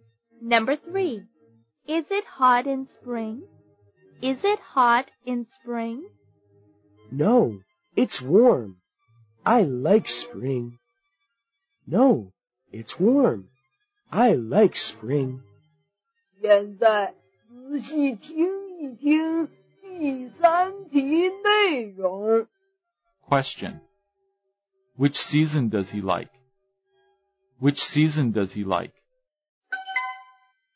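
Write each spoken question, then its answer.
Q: Which season does he like?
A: Spring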